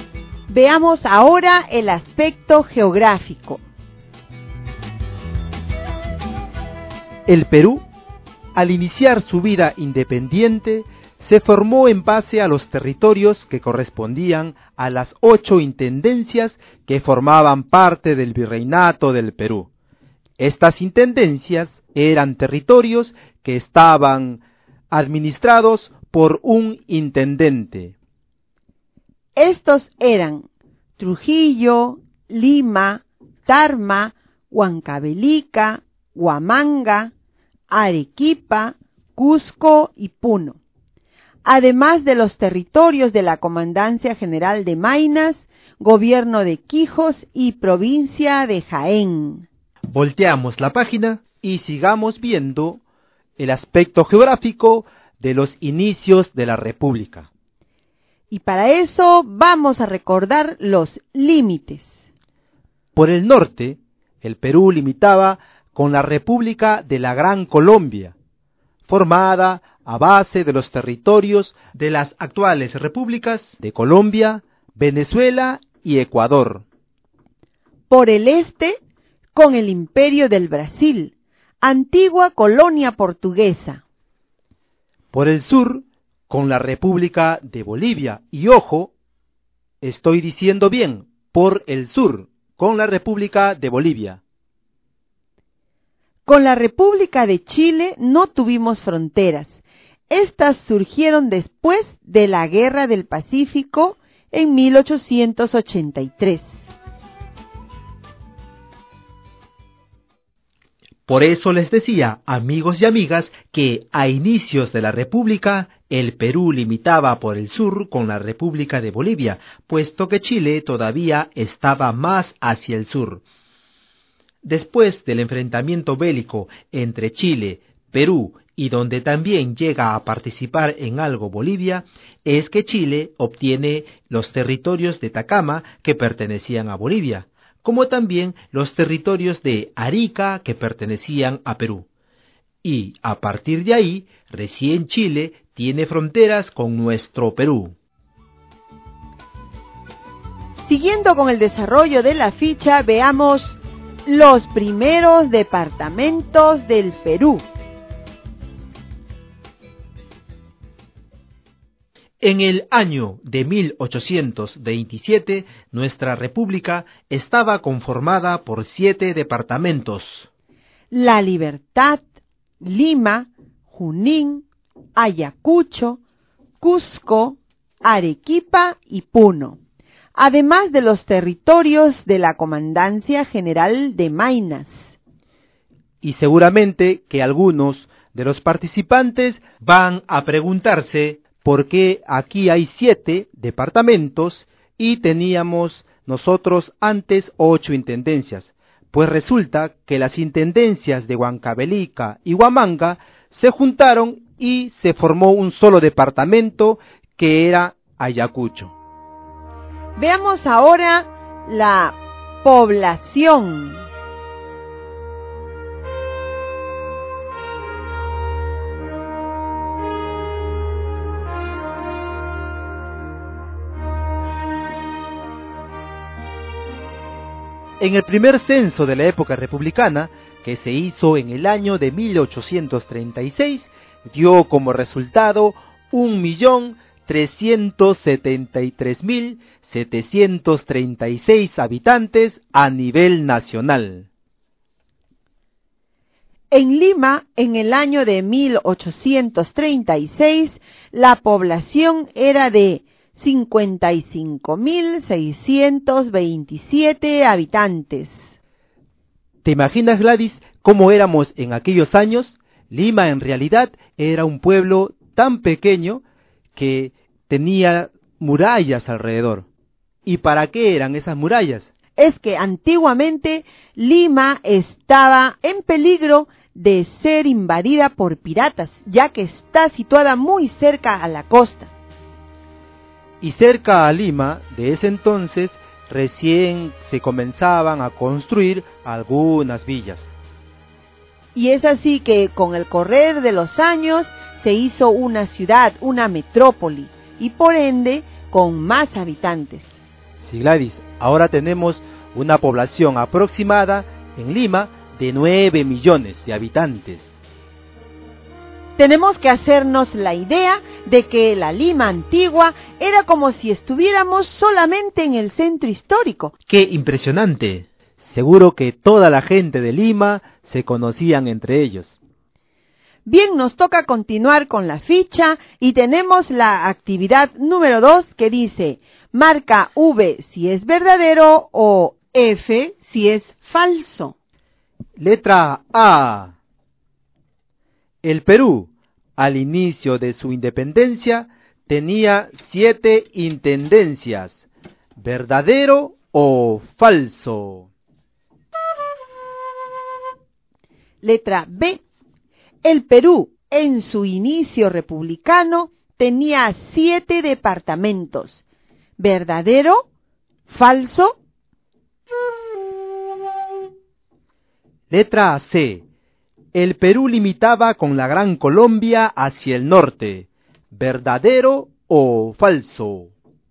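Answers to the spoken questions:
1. Falso (tenía 8 intendencias)
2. Verdadero
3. Verdadero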